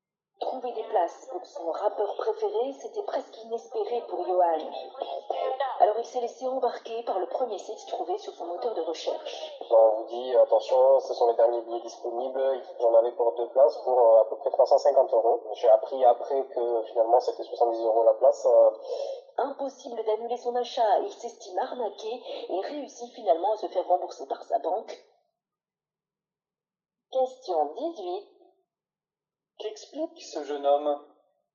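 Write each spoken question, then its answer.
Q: Qu'explique ce jeune homme ?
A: Il a payé ses billets de concert beaucoup trop cher (environ 350 euros pour deux places qui valaient 70 euros chacune) sur un site trouvé en ligne, et il s'est senti arnaqué.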